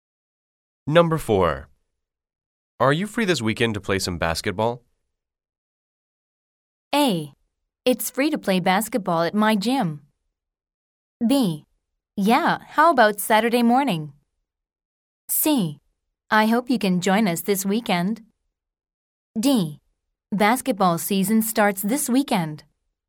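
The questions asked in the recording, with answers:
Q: Are you free this weekend to play some basketball?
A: B: Yeah, how about Saturday morning?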